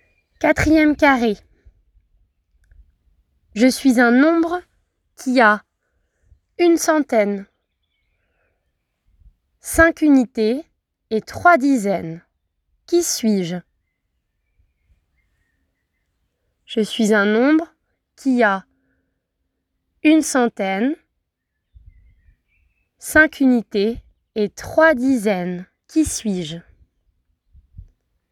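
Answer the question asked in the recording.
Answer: 135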